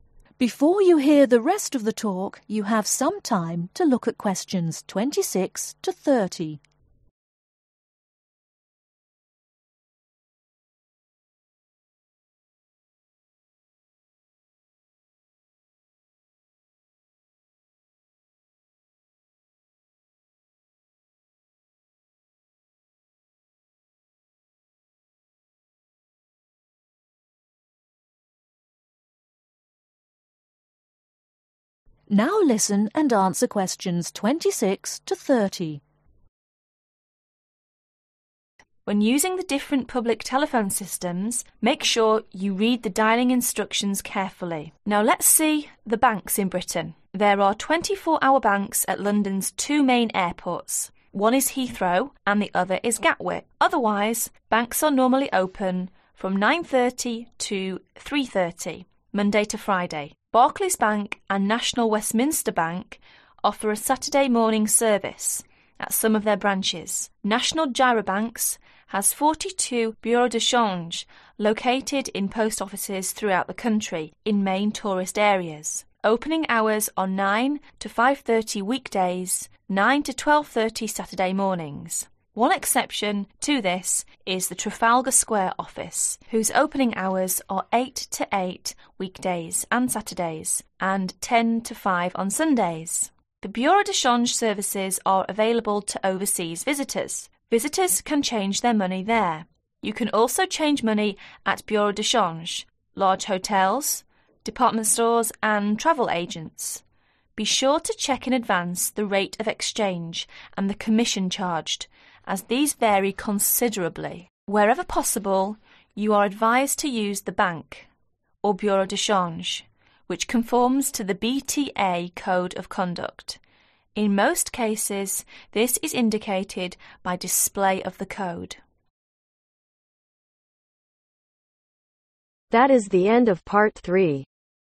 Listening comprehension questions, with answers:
Write NO MORE THAN TWO WORDS OR A NUMBER for each answer.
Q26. Banks are normally open from (26)............ to 15:30 Monday to Friday,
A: 9:30

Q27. but at London's two (27)............ there are 24 hours banks.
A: Main Airports

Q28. Trafalgar Square Office open from (28)............ to 20:00 weekdays and Saturdays.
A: 8:00

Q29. The Bureau de Change services are available to (29)............ .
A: Overseas Visitors

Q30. You can also change money at Bureau de change, large hotels, (30)............ and travel agents.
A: Department Stores